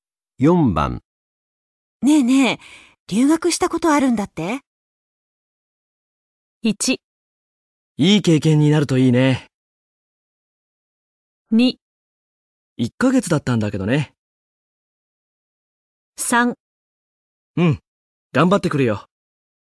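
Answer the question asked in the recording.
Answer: 2: 1ヶ月だったんだけどね。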